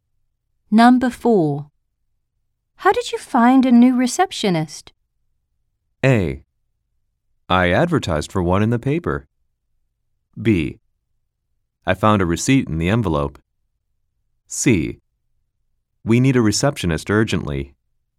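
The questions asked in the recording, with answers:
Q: How did you find a new receptionist?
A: A: I advertised for one in the paper.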